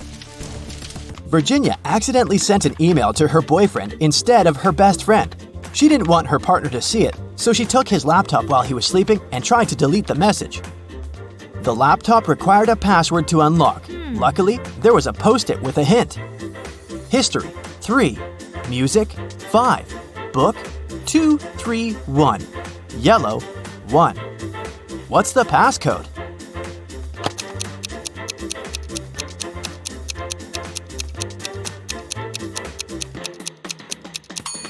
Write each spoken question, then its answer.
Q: What's the passcode?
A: The password is Scooby.